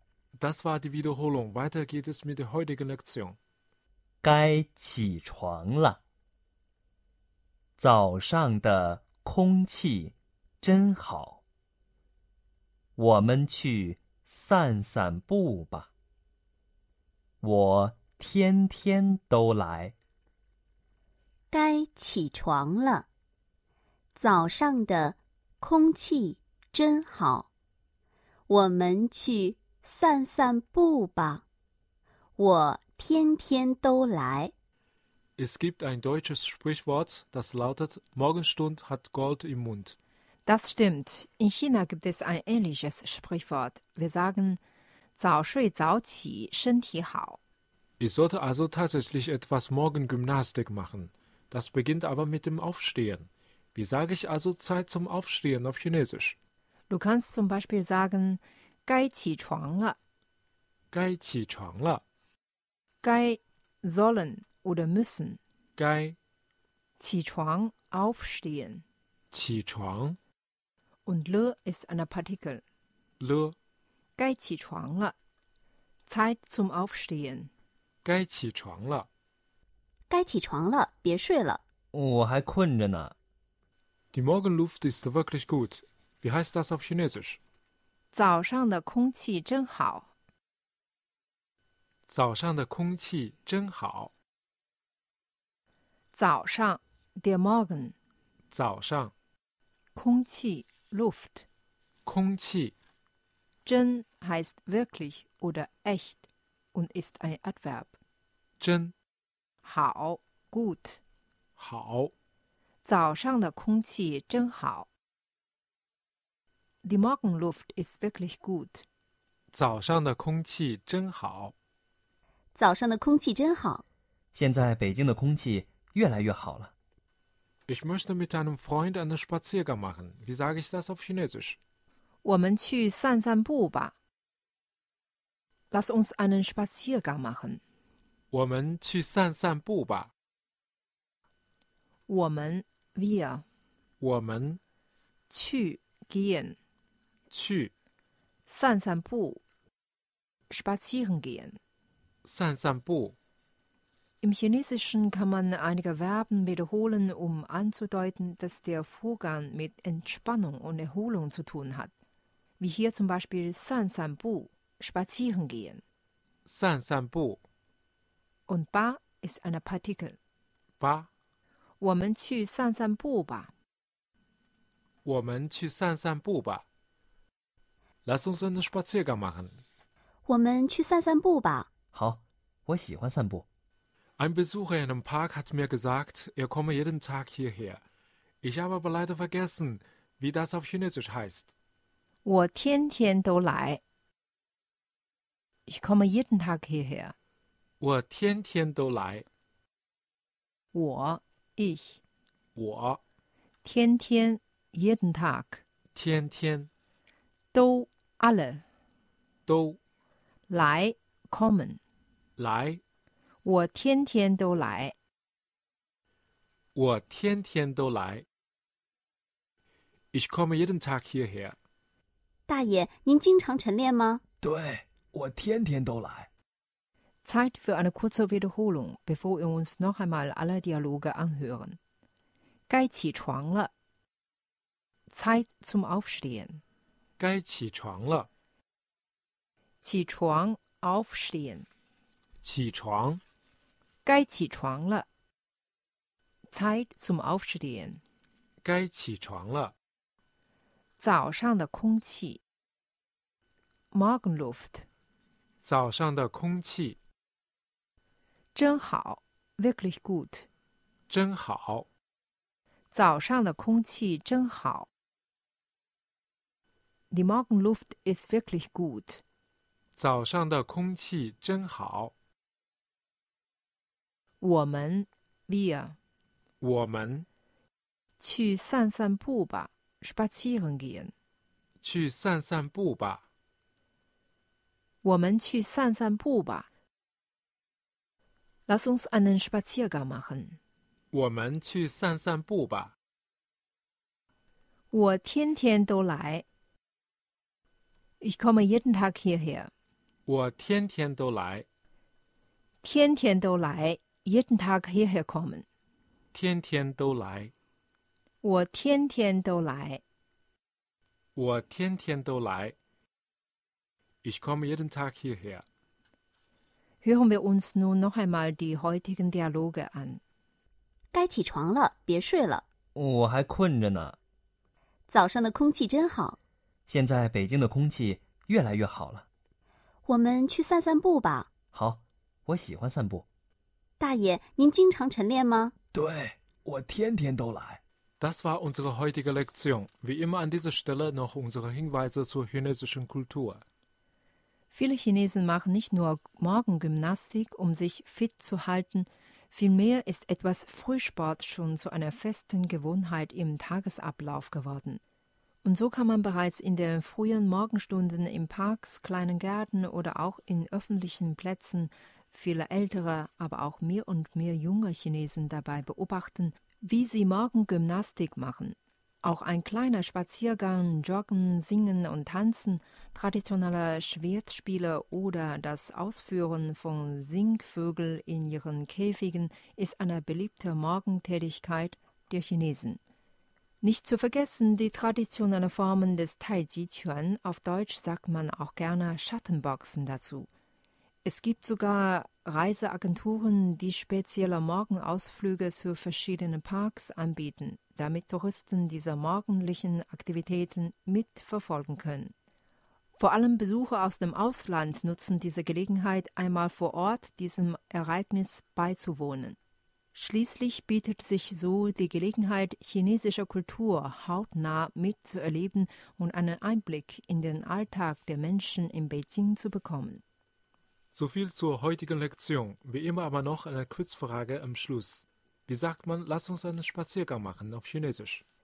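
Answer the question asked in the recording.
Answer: 我们去散散步吧。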